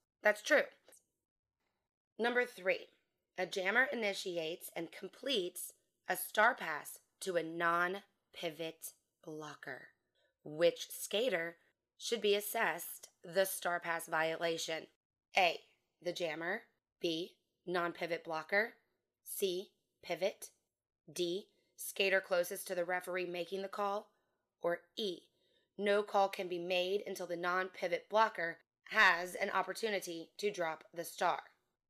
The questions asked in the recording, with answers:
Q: Which skater should be assessed the star pass violation?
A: The answer is E, no call should be made until the non-pivot blocker has an opportunity to drop the star.